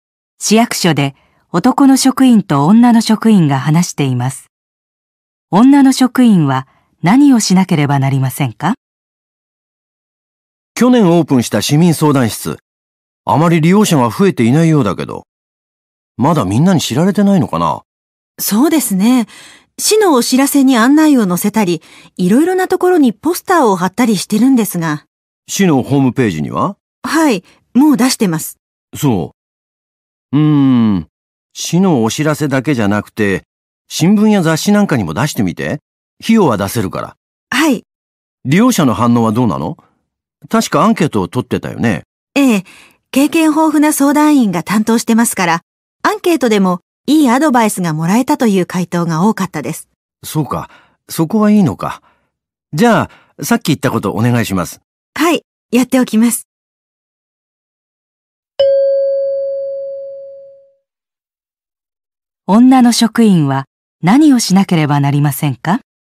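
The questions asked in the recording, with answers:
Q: 女の職員は何をしなければなりませんか?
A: 新聞や雑誌に市民相談室の案内を出す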